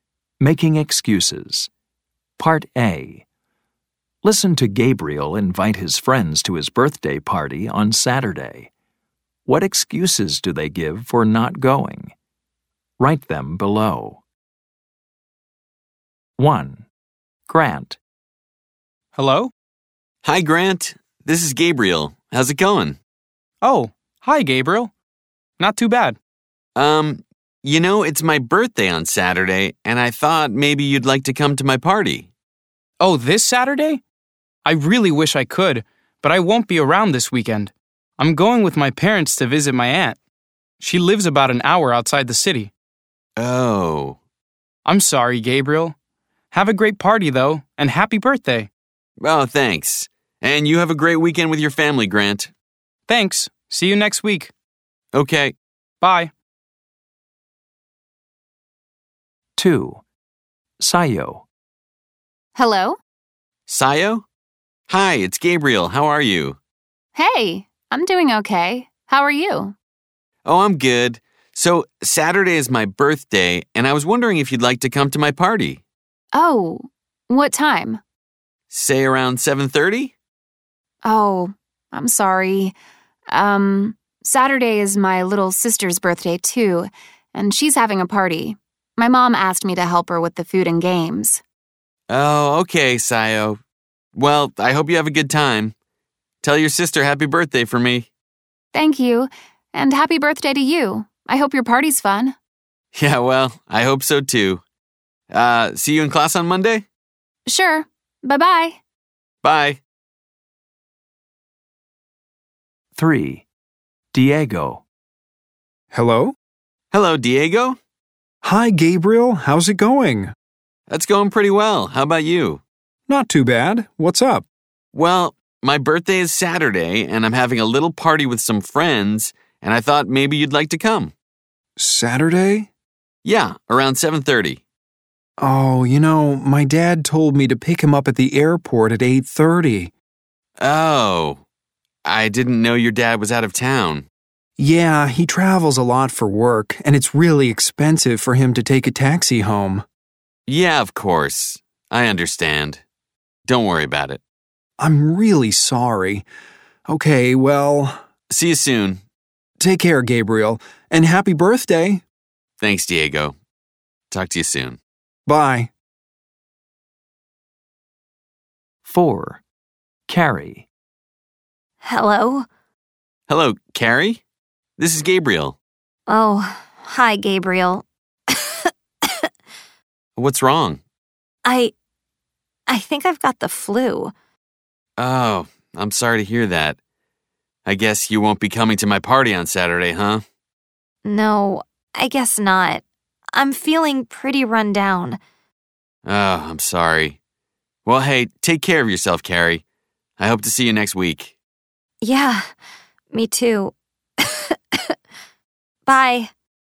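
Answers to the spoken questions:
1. Grant: he's going with his parents to visit his aunt this weekend
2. Sayo: it's her little sister's birthday party and she has to help with the food and games
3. Diego: he has to pick his dad up at the airport at 8:30
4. Carrie: she thinks she has the flu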